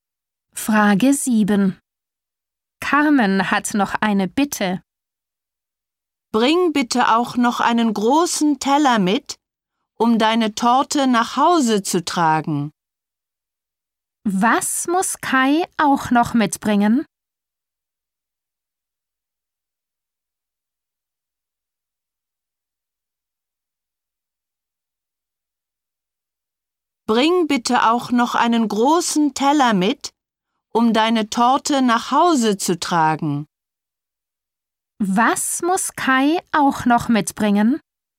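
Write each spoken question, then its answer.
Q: Was muss Kai auch noch mitbringen?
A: einen großen Teller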